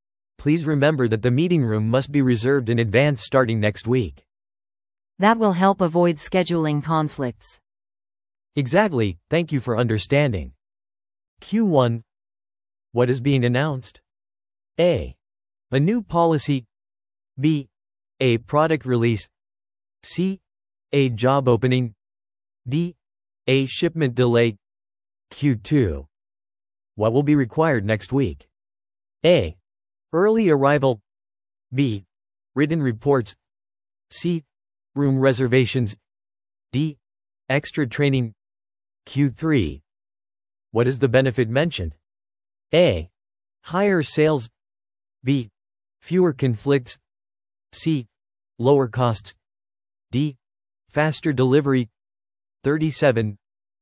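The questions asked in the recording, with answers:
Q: What is being announced?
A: A: A new policy.

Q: What will be required next week?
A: C: Room reservations.

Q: What is the benefit mentioned?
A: B: Fewer conflicts.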